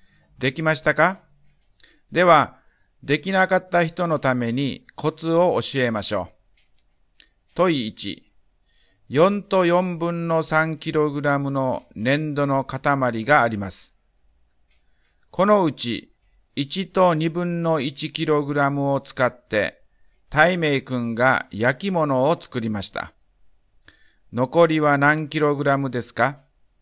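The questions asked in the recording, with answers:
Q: 残りは何キログラムですか?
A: 3と4分の1キログラム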